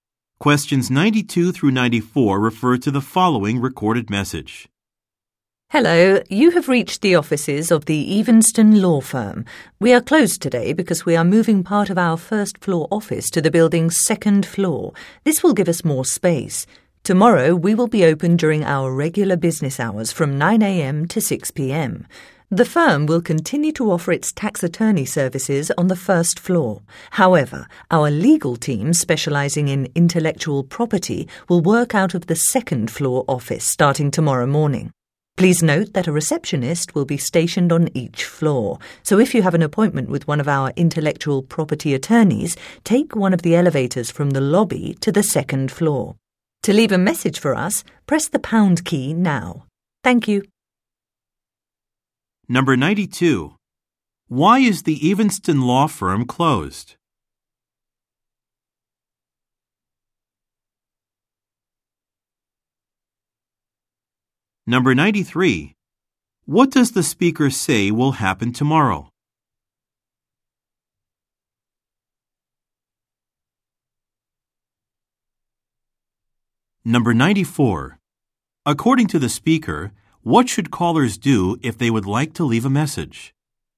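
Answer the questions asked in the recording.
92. It is moving part of its office to the second floor
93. The intellectual property team will work from the second floor
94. Press the pound key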